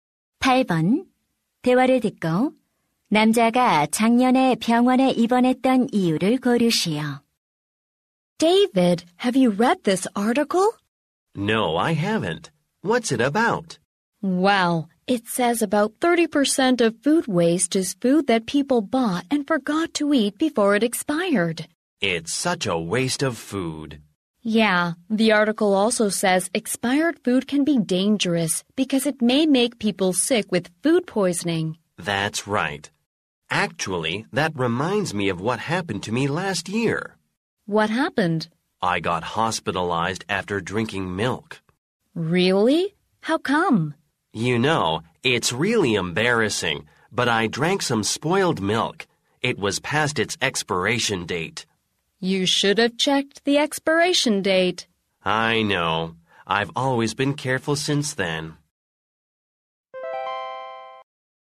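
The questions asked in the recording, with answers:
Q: 대화를 듣고 남자가 작년에 병원에 입원했던 이유를 고르시오.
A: 유통기한이 지난 상한 우유를 마셔서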